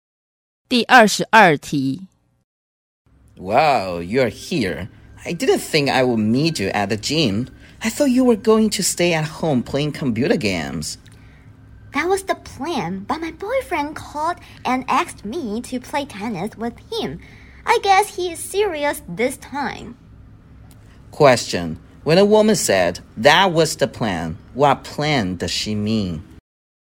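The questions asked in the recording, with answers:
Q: Question.When a woman said, that was the plan, what plan does she mean?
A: Staying at home playing computer games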